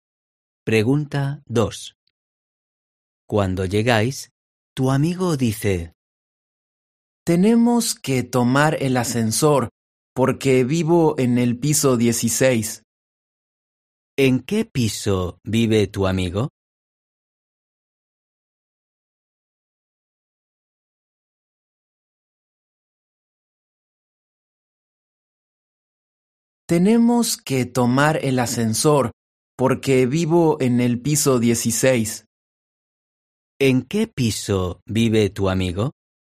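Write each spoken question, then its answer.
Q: ¿En qué piso vive tu amigo?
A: en el piso 16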